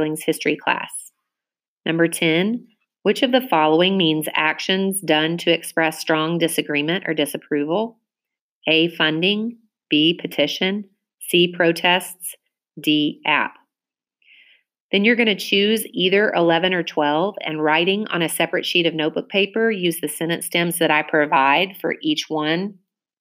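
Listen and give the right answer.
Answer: C: protests.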